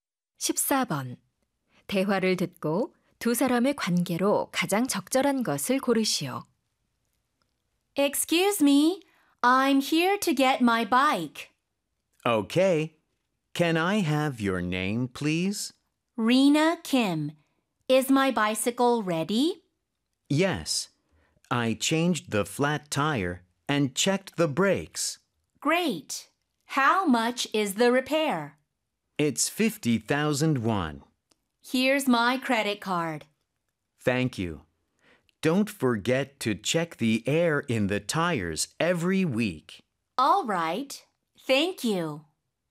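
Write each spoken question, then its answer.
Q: 대화를 듣고 두 사람의 관계로 가장 적절한 것을 고르시오.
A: 자전거 수리공 - 고객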